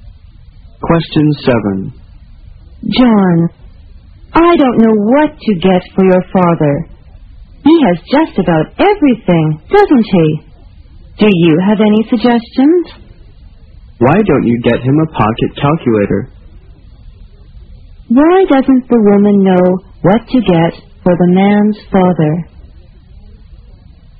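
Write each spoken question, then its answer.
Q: Why doesn't the woman know what to get for the man's father?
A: He has just about everything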